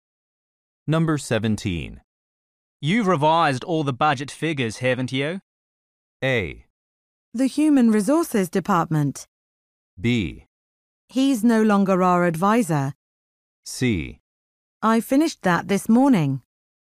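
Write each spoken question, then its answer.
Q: You've revised all the budget figures, haven't you?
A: C: I finished that this morning.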